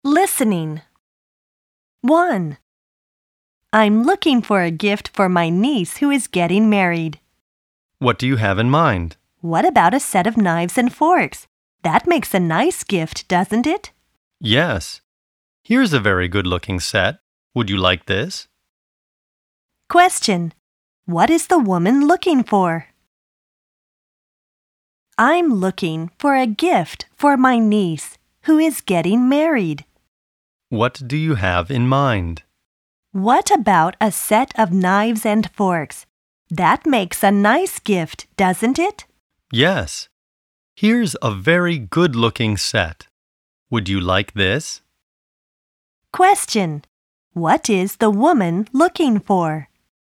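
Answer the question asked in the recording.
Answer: A wedding gift for her niece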